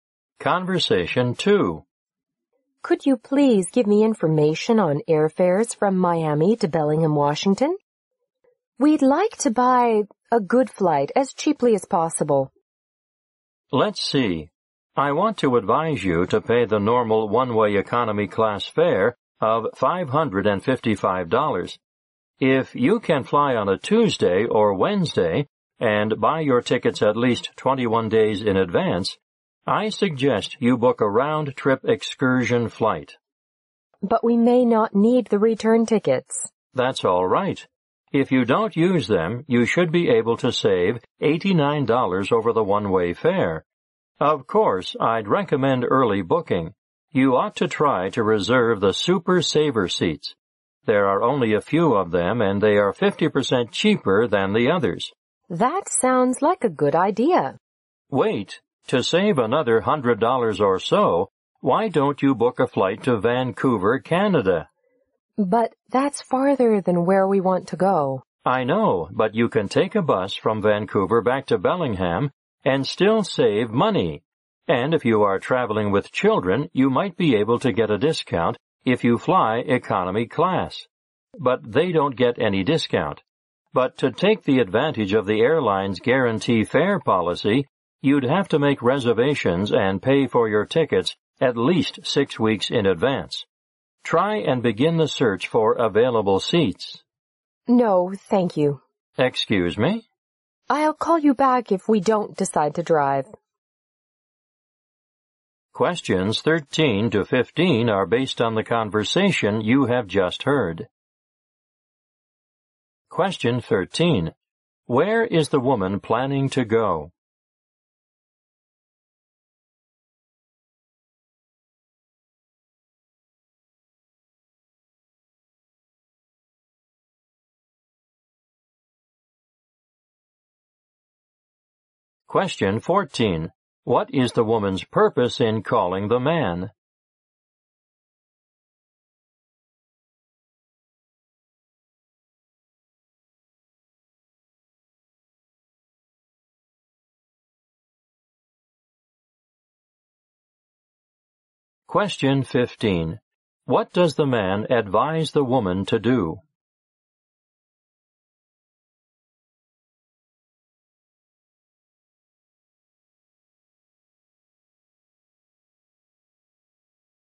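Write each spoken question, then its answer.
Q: Where is the woman planning to go?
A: Bellingham, Washington.

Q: What is the woman's purpose in calling the man?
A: To get information on airfares and find a cheap flight.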